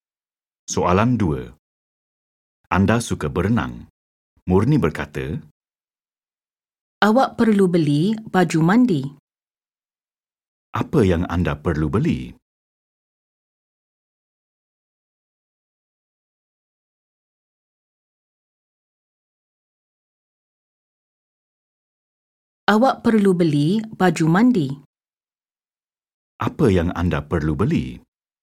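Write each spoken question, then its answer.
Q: Apa yang anda perlu beli?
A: baju mandi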